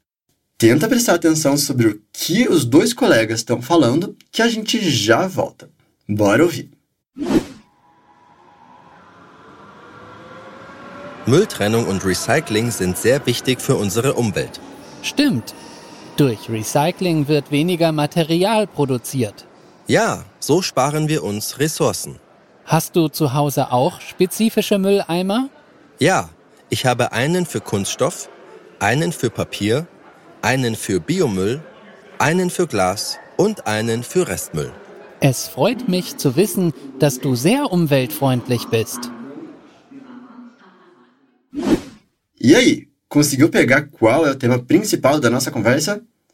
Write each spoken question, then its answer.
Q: E aí, conseguiu pegar qual é o tema principal da nossa conversa?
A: É sobre reciclagem e separação de lixo.